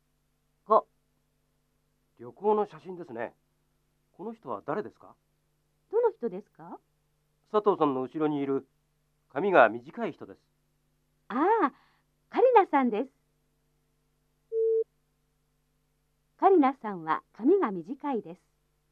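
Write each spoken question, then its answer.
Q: カリナさんは髪が短いです。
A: 正しい(○)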